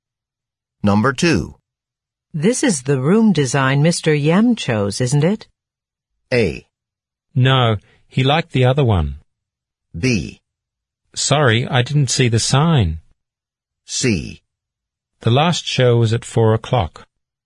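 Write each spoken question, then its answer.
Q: This is the room design Mr. Yam chose, isn't it?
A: A: No, he liked the other one.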